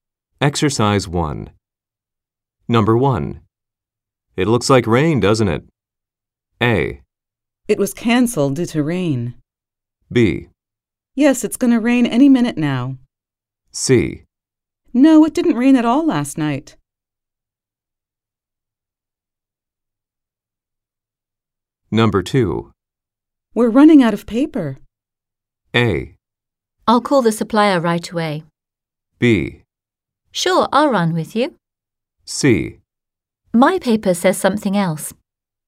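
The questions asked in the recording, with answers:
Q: It looks like rain, doesn't it?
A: B: Yes, it's going to rain any minute now.

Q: We're running out of paper.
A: A: I'll call the supplier right away.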